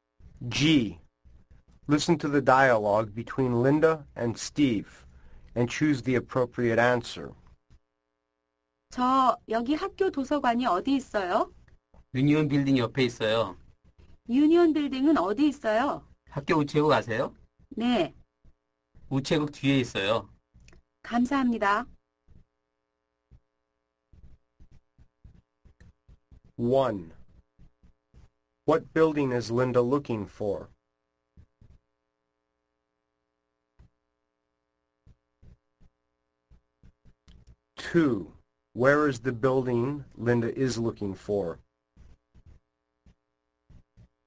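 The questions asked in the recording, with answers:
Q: What building is Linda looking for?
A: The school library

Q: Where is the building Linda is looking for?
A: Next to the Union Building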